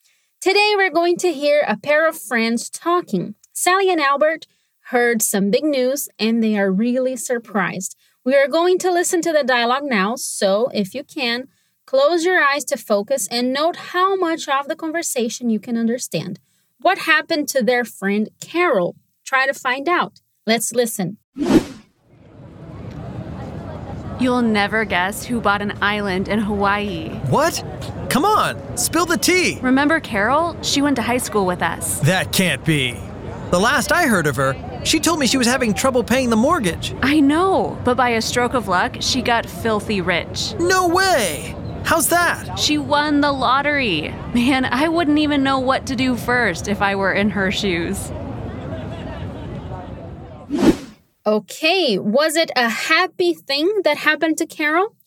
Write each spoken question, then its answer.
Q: What happened to their friend Carol?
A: we know that Carol was very lucky she got filthy rich because she won the lottery and she bought an island.

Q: Okay, was it a happy thing that happened to Carol?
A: Lucky Carol.